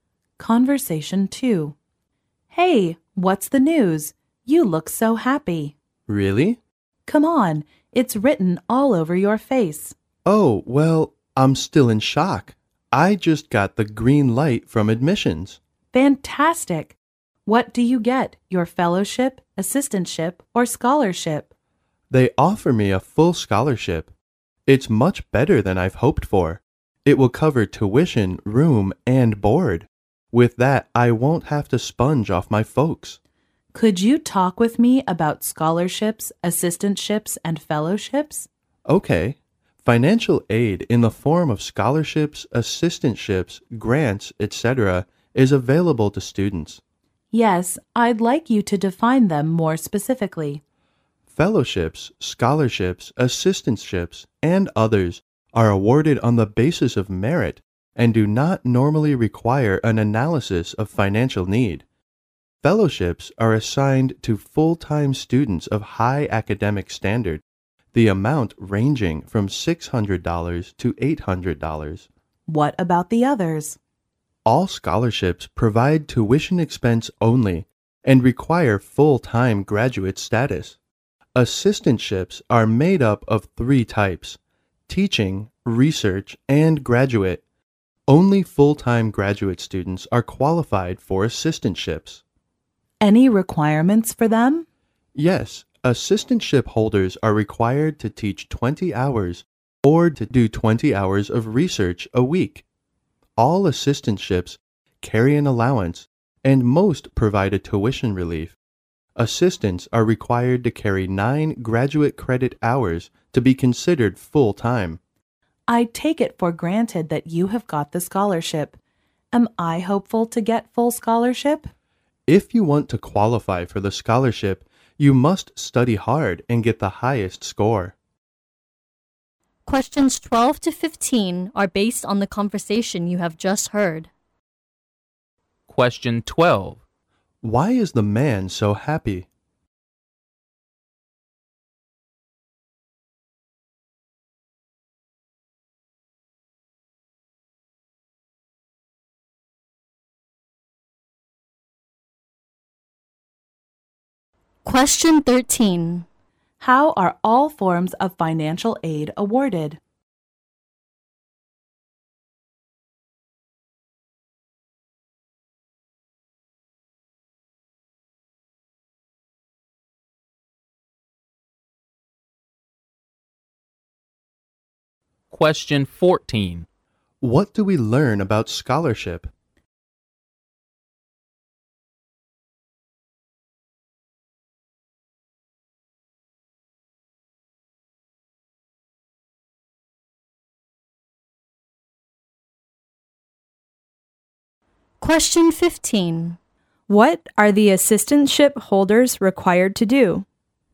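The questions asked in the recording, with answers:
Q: Why is the man so happy?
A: He has been admitted and offered a full scholarship.

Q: How are all forms of financial aid awarded?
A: On the basis of merit.

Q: What do we learn about scholarship?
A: It covers only tuition and requires full-time graduate status.

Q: What are the assistantship holders required to do?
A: Teach or do research for 20 hours a week.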